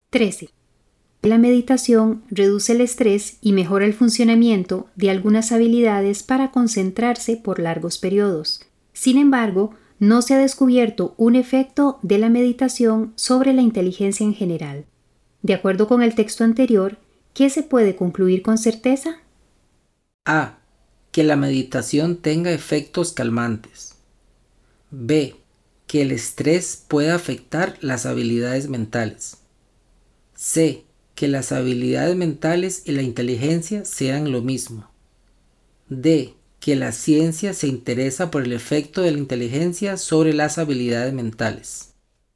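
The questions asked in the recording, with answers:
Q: De acuerdo con el texto anterior, ¿qué se puede concluir con certeza?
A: A: Que la meditación tenga efectos calmantes.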